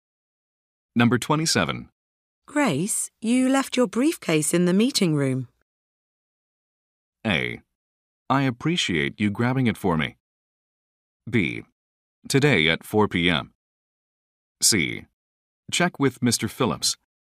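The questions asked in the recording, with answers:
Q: Grace, you left your briefcase in the meeting room.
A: A: I appreciate you grabbing it for me.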